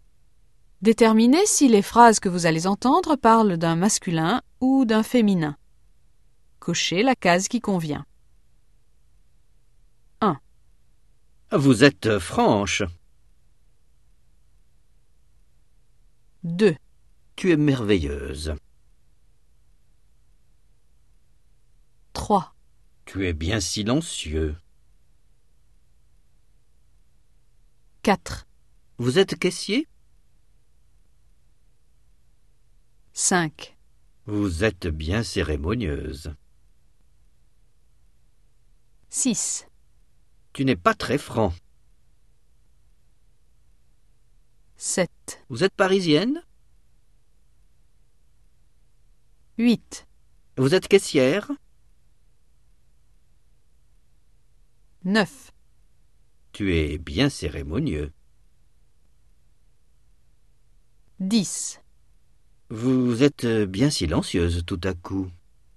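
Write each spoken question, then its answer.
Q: Vous êtes franche.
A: féminin

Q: Tu es merveilleuse.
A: féminin

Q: Tu es bien silencieux.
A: masculin

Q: Vous êtes caissier?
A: masculin

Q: Vous êtes bien cérémonieuse.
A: féminin

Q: Tu n'es pas très franc.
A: masculin

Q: Vous êtes parisienne?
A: féminin

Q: Vous êtes caissière?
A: féminin

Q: Tu es bien cérémonieux.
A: masculin

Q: Vous êtes bien silencieuse tout à coup.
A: féminin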